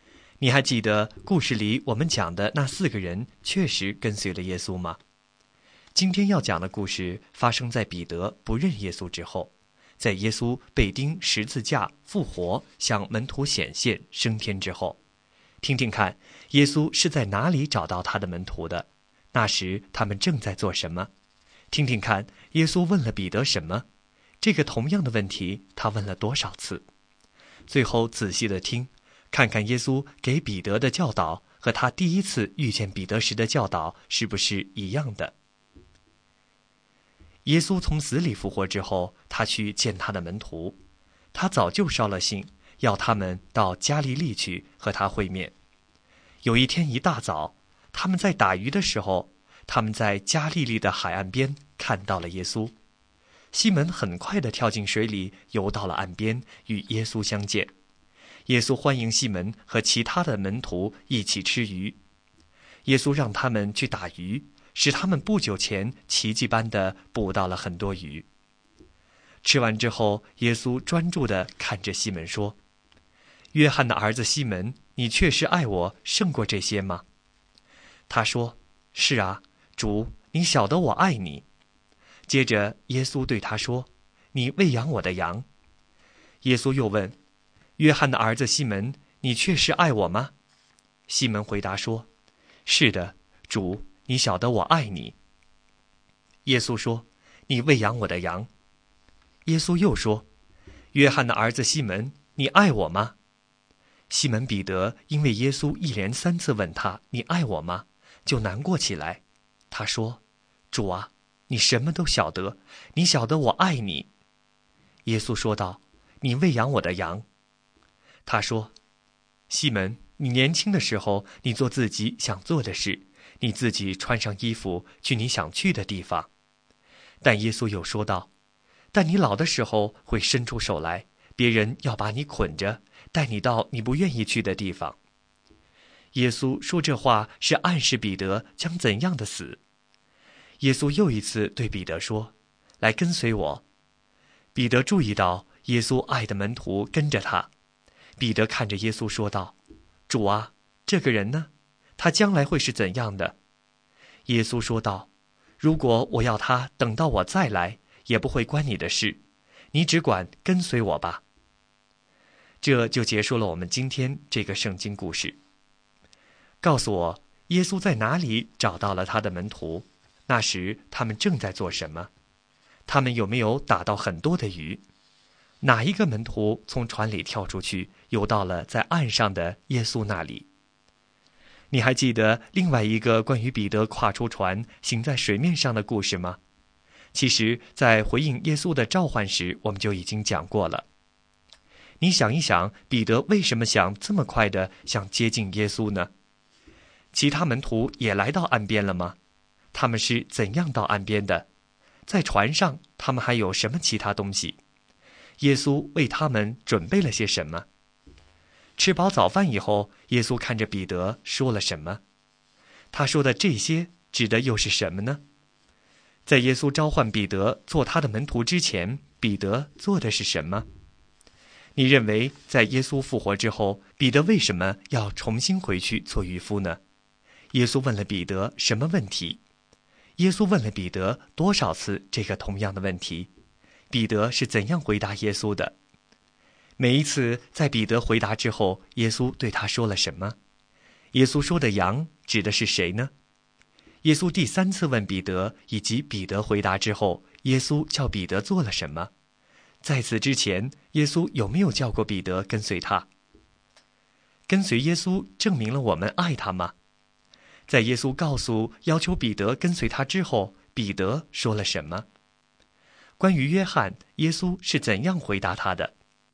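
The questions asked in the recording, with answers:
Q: 告诉我,耶稣在哪里找到了他的门徒?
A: 在加利利的海边

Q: 那时他们正在做什么?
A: 打鱼

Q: 他们有没有打到很多的鱼?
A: 有,奇迹般地捕到了很多鱼

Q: 哪一个门徒从船里跳出去,游到了在岸上的耶稣那里?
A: 西门彼得

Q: 耶稣问了彼得什么问题?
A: 约翰的儿子西门,你爱我吗?

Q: 耶稣问了彼得多少次这个同样的问题?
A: 三次

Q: 彼得是怎样回答耶稣的?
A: 主,你晓得我爱你

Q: 每一次在彼得回答之后,耶稣对他说了什么?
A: 你喂养我的羊

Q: 在耶稣告诉要求彼得跟随他之后,彼得说了什么?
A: 主啊,这个人呢?他将来会是怎样的?

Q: 关于约翰,耶稣是怎样回答他的?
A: 如果我要他等到我再来,与你无关,你只管跟随我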